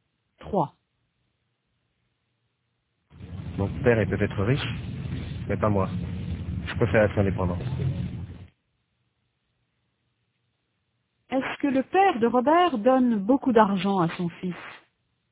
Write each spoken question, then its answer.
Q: Est-ce que le père de Robert donne beaucoup d'argent à son fils?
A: Non, Robert préfère être indépendant.